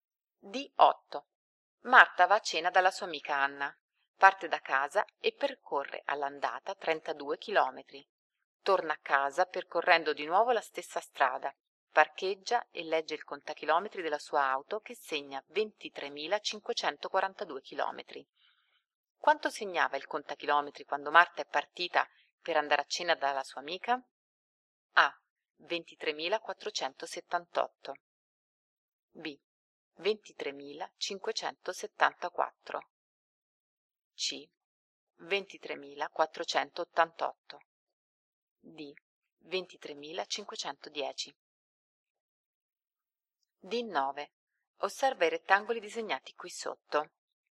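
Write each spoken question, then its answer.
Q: Quanto segnava il contachilometri quando Marta è partita per andare a cena dalla sua amica?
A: A: 23.478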